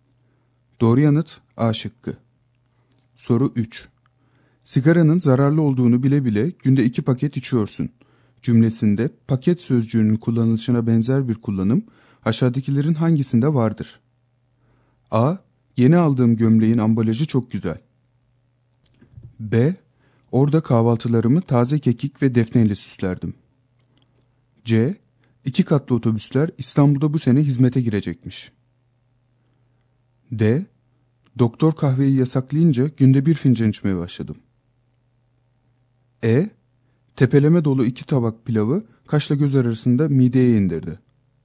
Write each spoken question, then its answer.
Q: Sigaranın zararlı olduğunu bile bile günde 2 paket içiyorsun cümlesinde paket sözcüğünün kullanılışına benzer bir kullanım aşağıdakilerin hangisinde vardır?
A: Doğru yanıt D şıkkı.